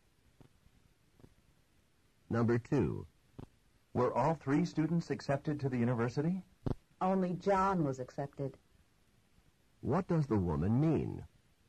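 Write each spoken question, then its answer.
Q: What does the woman mean?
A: Only John was accepted; the other two weren't.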